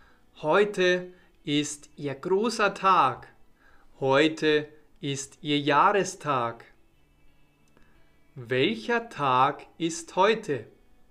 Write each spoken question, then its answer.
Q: Welcher Tag ist heute?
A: ihr Jahrestag.